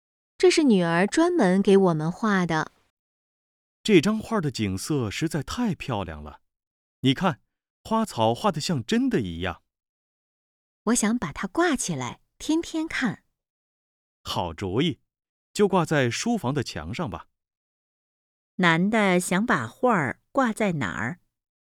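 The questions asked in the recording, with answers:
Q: 男的想把画挂在哪儿?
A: 书房的墙上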